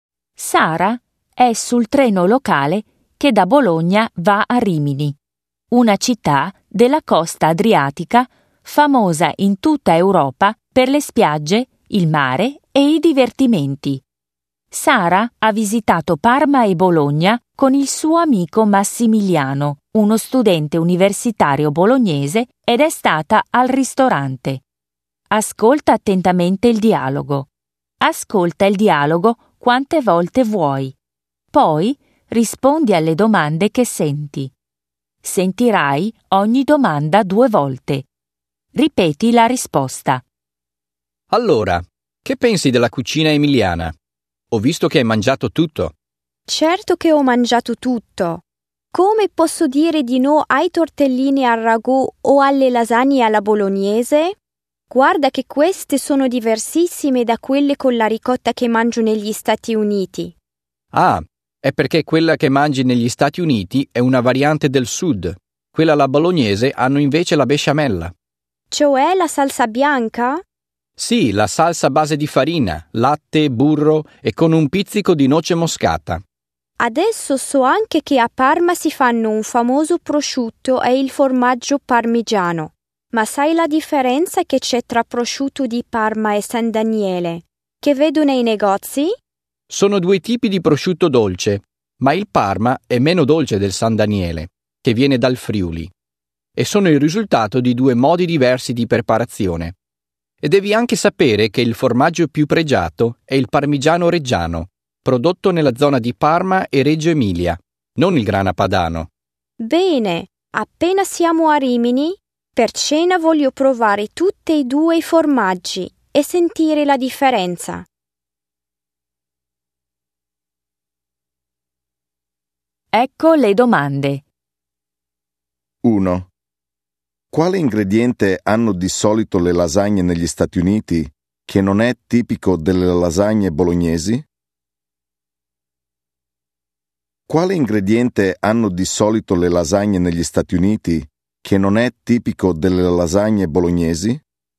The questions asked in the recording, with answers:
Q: Quale ingrediente hanno di solito le lasagne negli Stati Uniti che non è tipico delle lasagne bolognesi?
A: Hanno la ricotta.